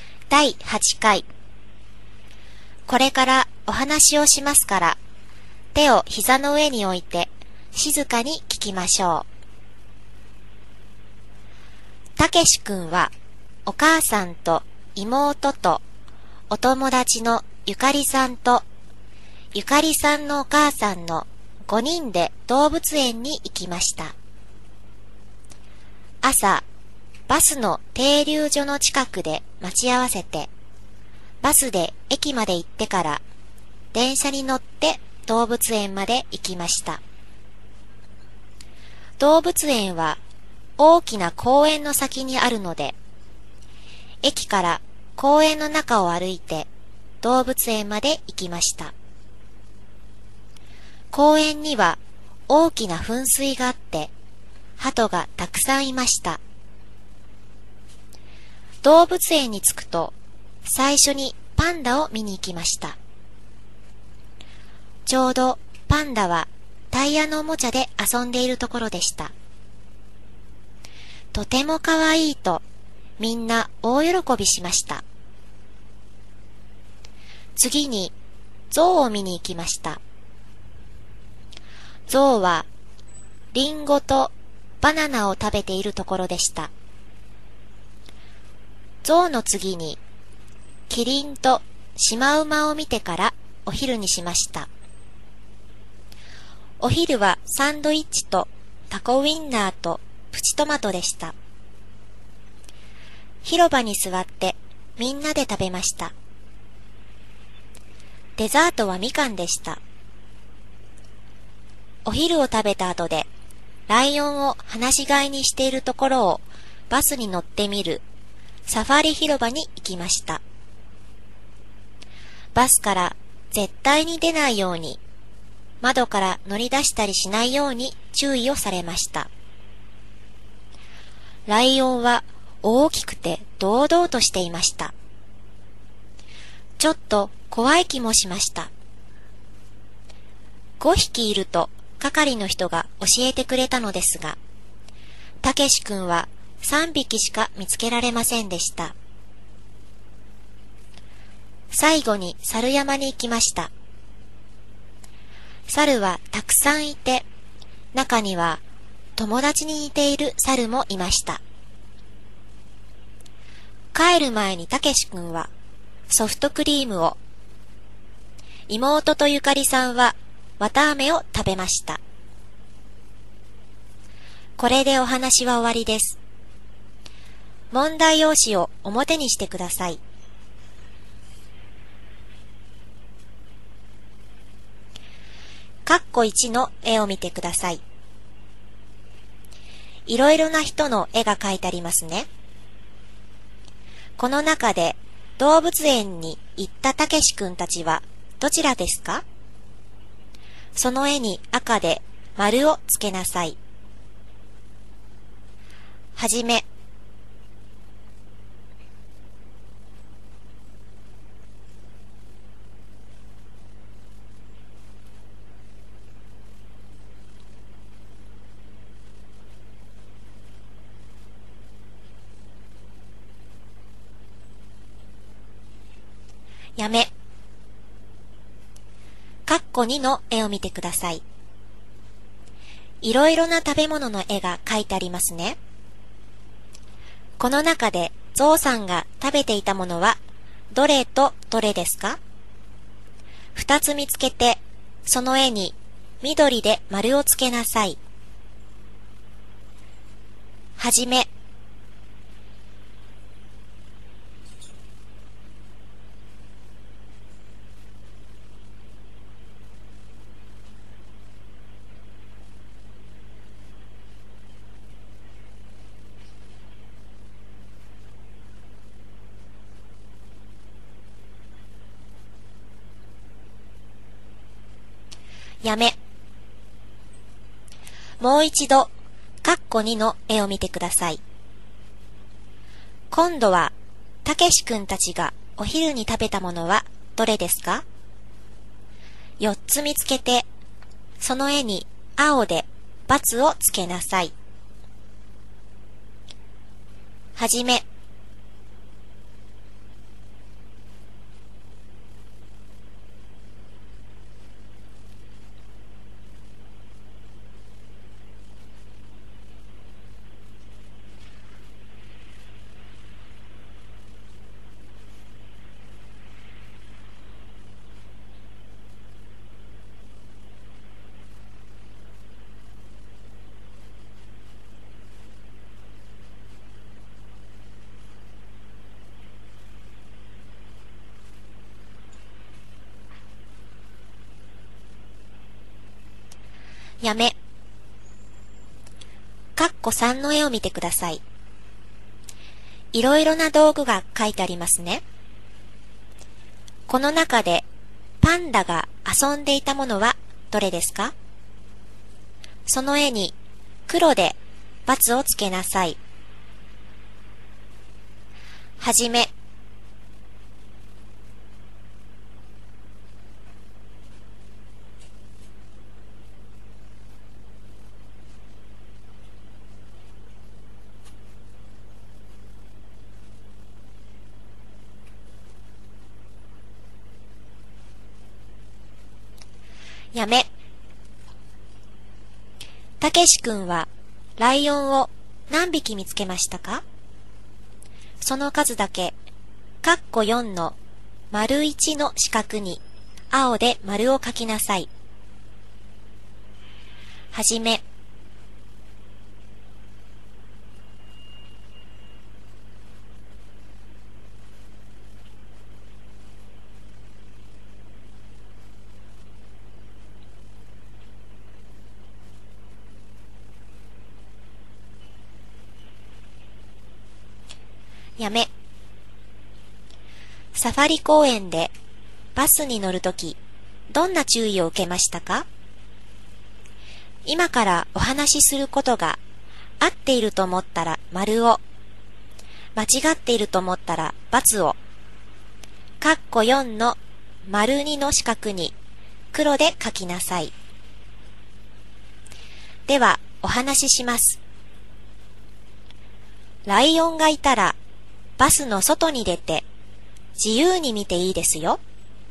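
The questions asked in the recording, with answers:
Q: この中でゾウさんが食べていたものはどれとどれですか?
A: リンゴとバナナ

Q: 今度は、たけしくんたちがお昼に食べたものはどれですか?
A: サンドイッチ、タコウインナー、プチトマト、みかん

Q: この中でパンダが遊んでいたものはどれですか?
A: タイヤのおもちゃ

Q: たけしくんはライオンを何匹見つけましたか?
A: 3匹

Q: ライオンがいたら、バスの外に出て自由に見ていいですよ。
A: ×(間違い)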